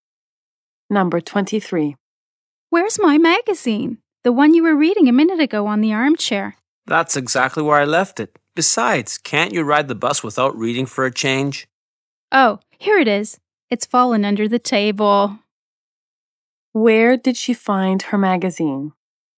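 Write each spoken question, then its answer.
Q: Where did she find her magazine?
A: Under the table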